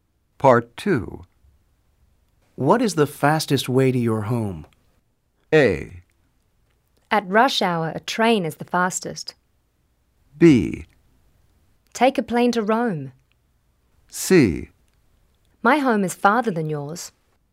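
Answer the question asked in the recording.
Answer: A: At rush hour, a train is the fastest.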